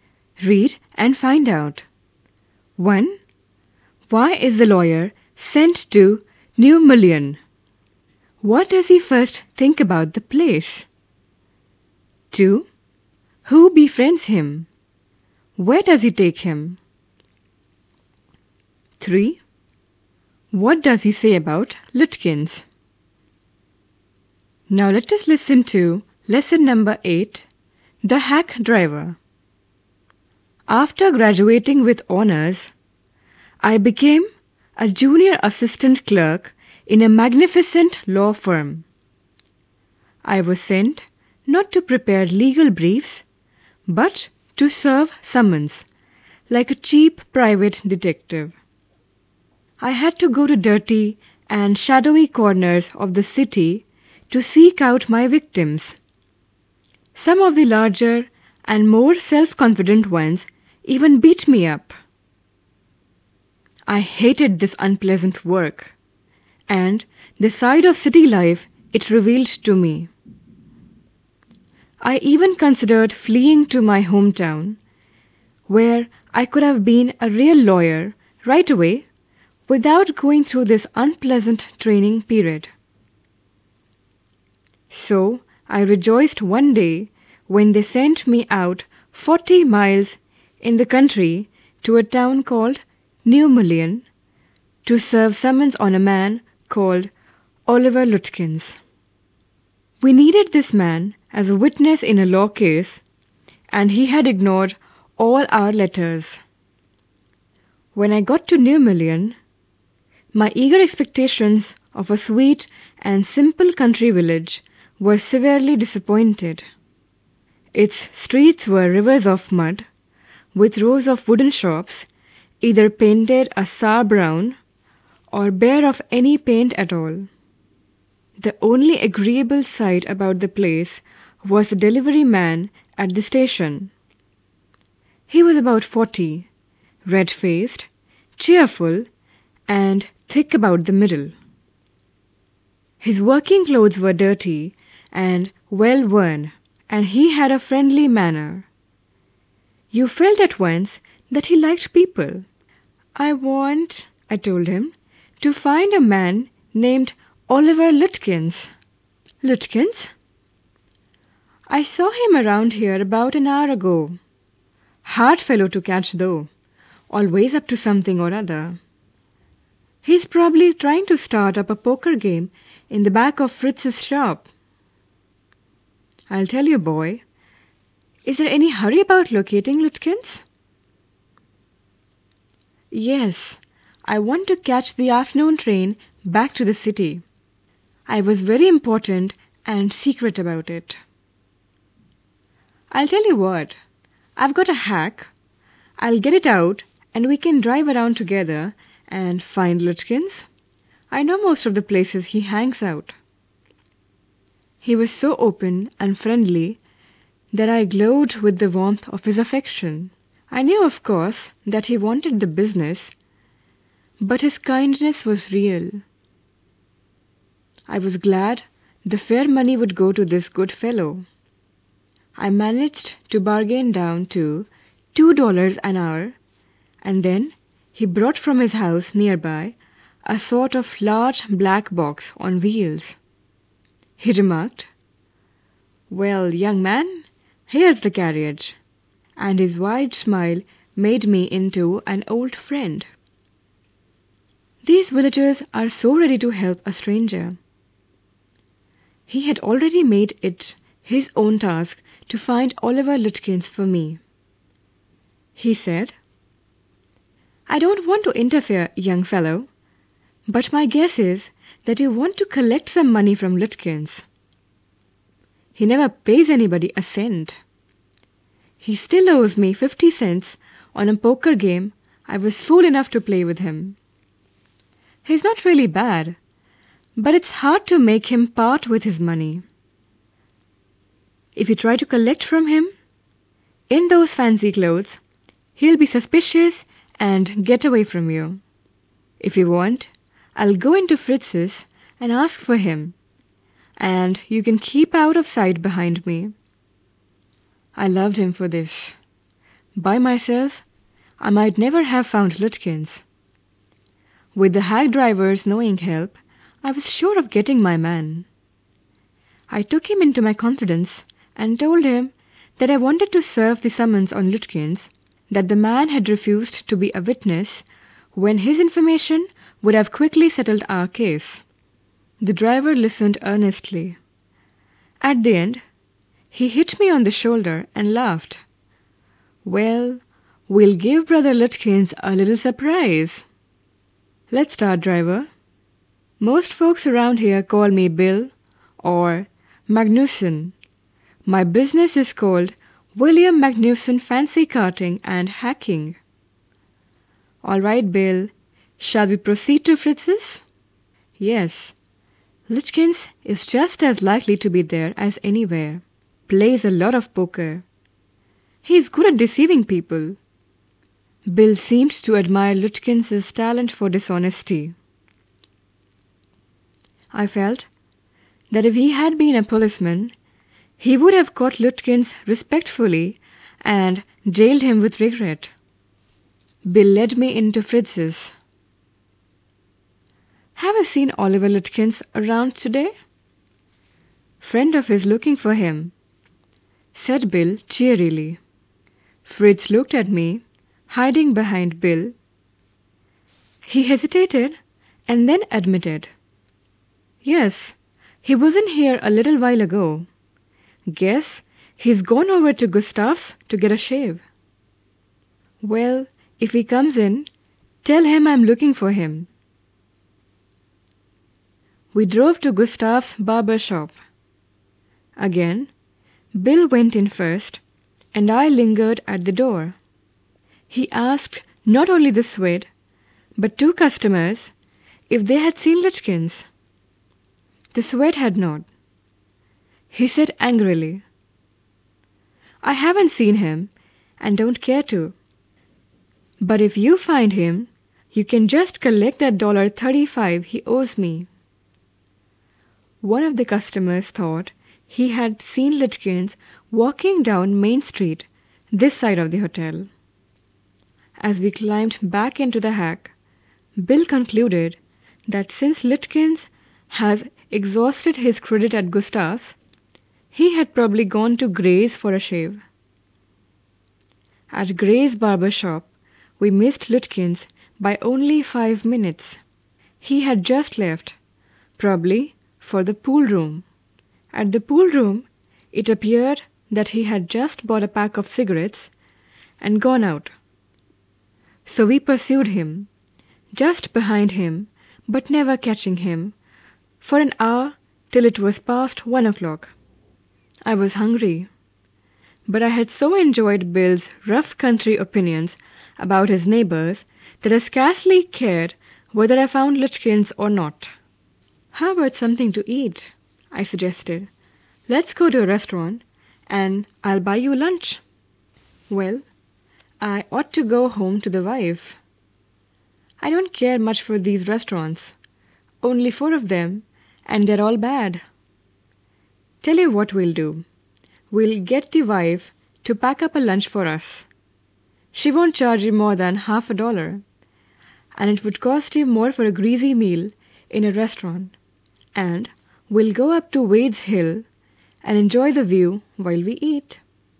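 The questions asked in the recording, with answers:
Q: Why is the lawyer sent to New Mullion?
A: To serve summons on Oliver Lutkins, who was needed as a witness

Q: What does he first think about the place?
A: He is disappointed: muddy streets and ugly, unpainted wooden shops

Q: Who befriends him? Where does he take him?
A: The hack driver (Bill Magnusson); around the village looking for Lutkins: Fritz's, Gustav's and Gray's barber shops, the pool room

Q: What does he say about Lutkins?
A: He is hard to catch, plays poker and never pays anybody, owing money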